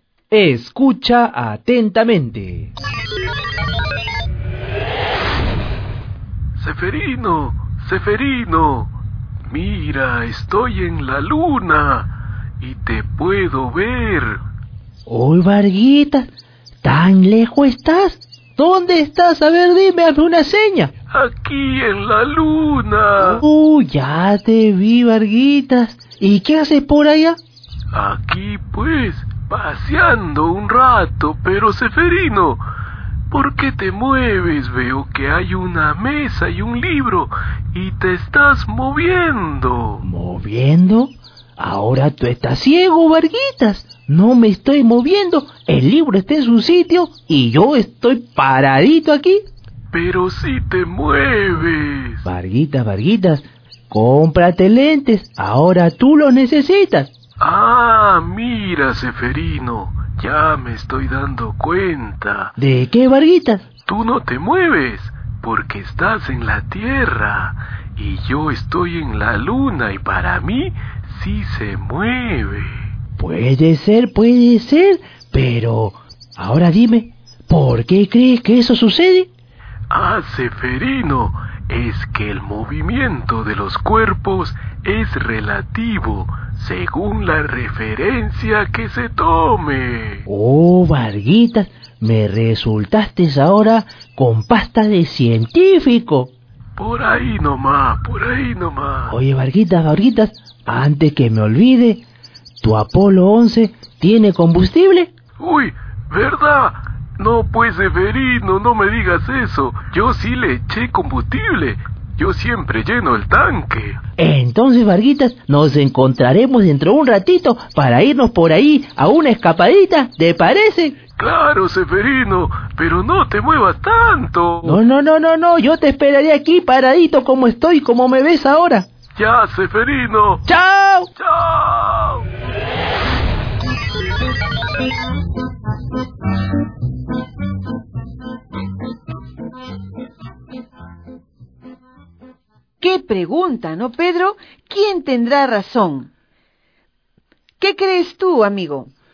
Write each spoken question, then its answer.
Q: ¿Quién tendrá razón?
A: La respuesta es que los dos tienen razón, ya que ambos toman como referencia distintos objetos.